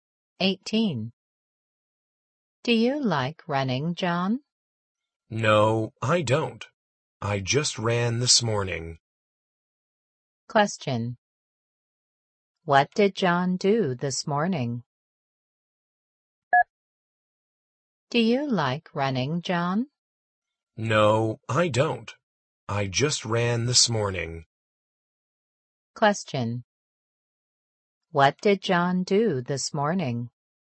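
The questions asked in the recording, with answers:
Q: What did John do this morning?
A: He ran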